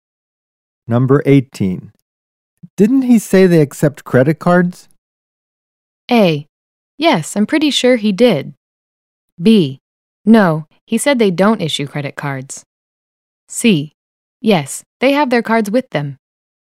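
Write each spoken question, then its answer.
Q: Didn't he say they accept credit cards?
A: A: Yes, I'm pretty sure he did.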